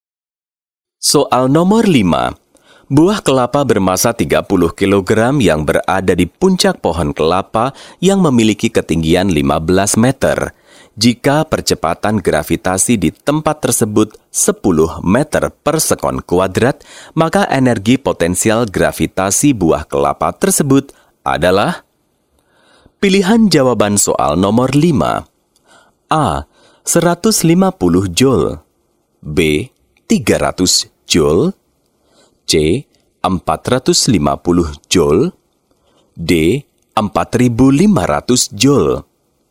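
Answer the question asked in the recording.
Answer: D: 4500 joule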